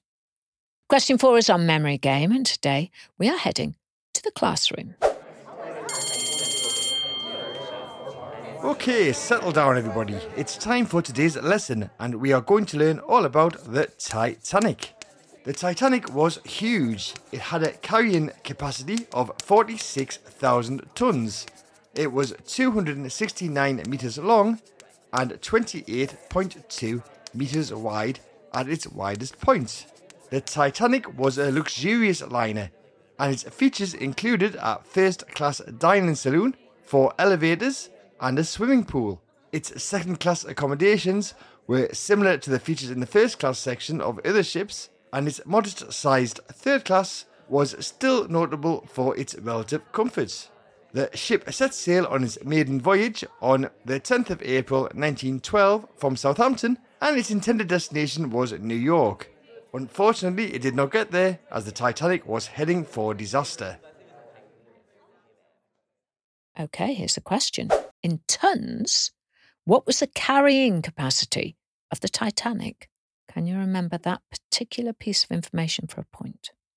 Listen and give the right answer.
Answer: And the answer is 46,000 tons.